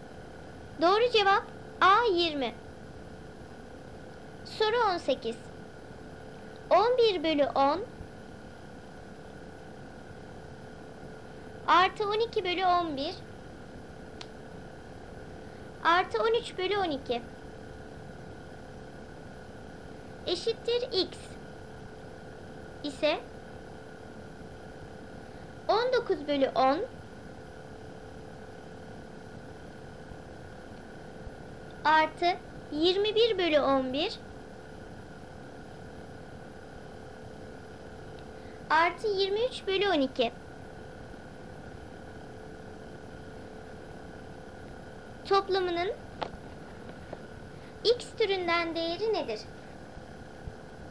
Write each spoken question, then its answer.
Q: Toplamının x türünden değeri nedir?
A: 9 eksi x.